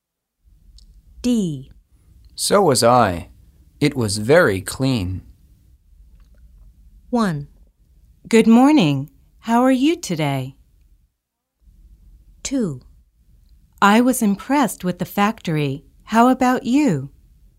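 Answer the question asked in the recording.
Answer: 2: I was impressed with the factory. How about you?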